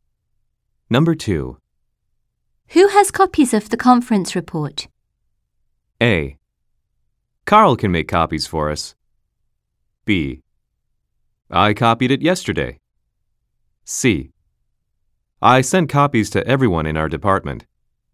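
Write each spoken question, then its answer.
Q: Who has copies of the conference report?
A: C: I sent copies to everyone in our department.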